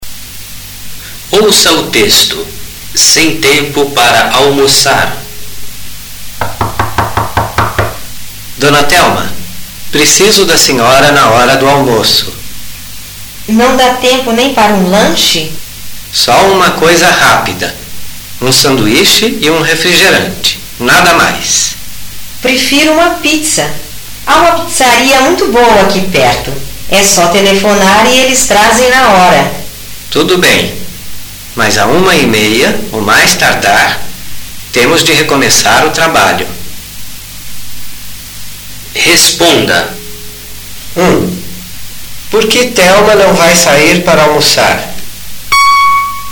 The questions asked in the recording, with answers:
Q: Por que Thelma não vai sair para almoçar?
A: Porque o chefe vai precisar dela.